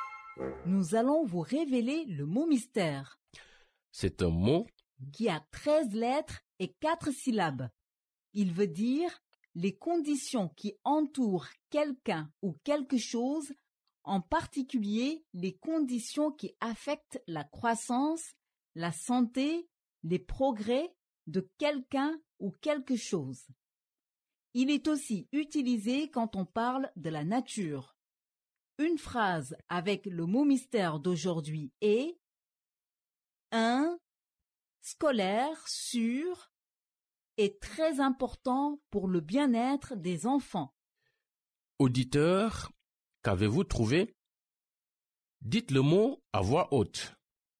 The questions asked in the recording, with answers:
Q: Auditeur, qu'avez-vous trouvé?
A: Le mot mystère d'aujourd'hui est environnement.